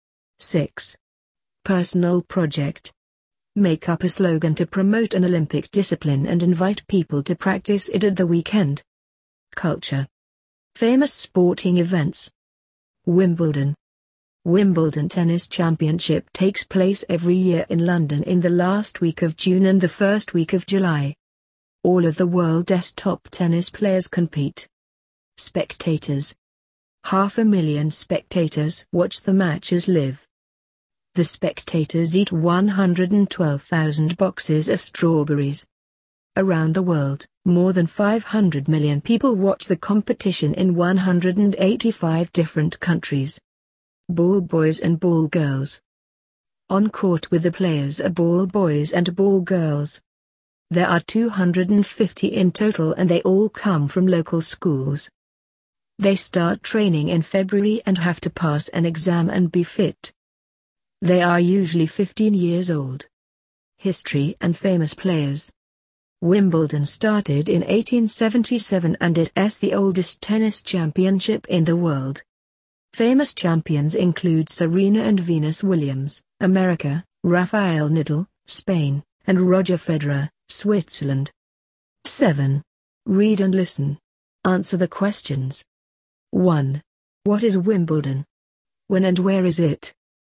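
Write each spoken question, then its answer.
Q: What is Wimbledon? When and where is it?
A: A tennis championship; every year in London, in the last week of June and the first week of July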